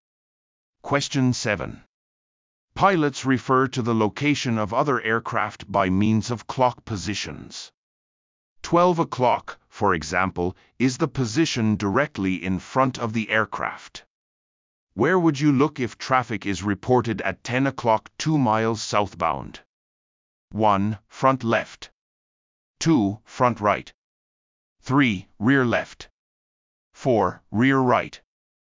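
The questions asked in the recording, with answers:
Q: Where would you look if traffic is reported at 10 o'clock 2 miles southbound?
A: 1: Front left.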